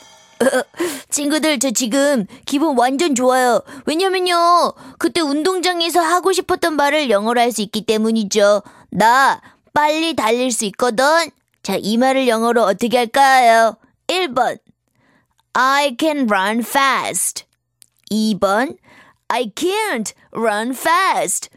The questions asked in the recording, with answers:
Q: 나 빨리 달릴 수 있거든. 자, 이 말을 영어로 어떻게 할까요?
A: 당연히 정답은 1번이죠.